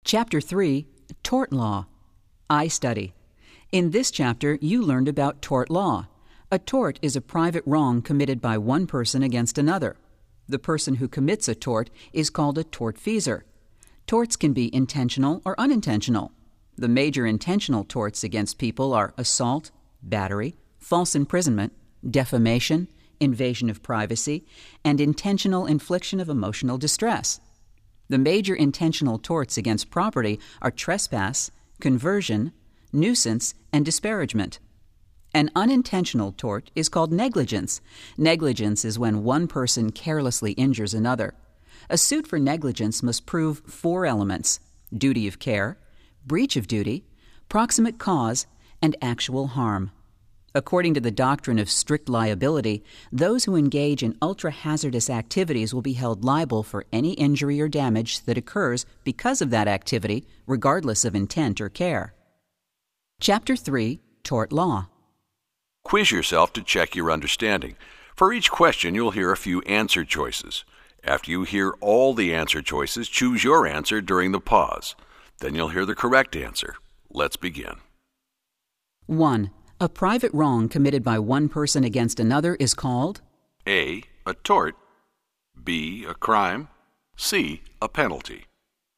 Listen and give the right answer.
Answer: The correct answer is A. A tort.